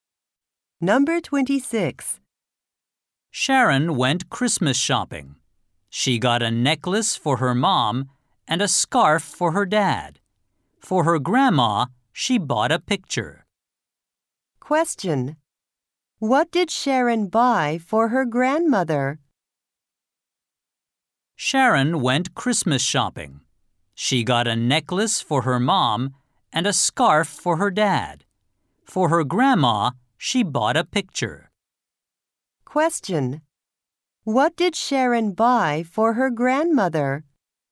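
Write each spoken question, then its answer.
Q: What did Sharon buy for her grandmother?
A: A picture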